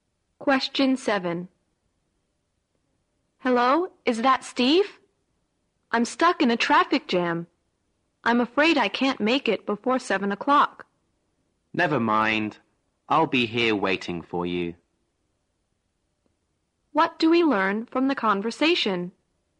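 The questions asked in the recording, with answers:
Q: What do we learn from the conversation?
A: The caller is stuck in traffic and will be late; Steve will wait for him.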